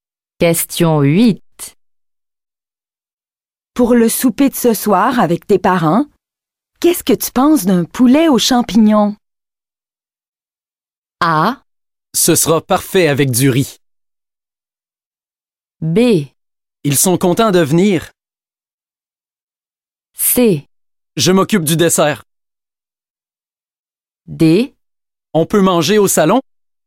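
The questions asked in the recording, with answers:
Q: Pour le souper de ce soir avec tes parents, qu'est-ce que tu penses d'un poulet aux champignons?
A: A: Ce sera parfait avec du riz.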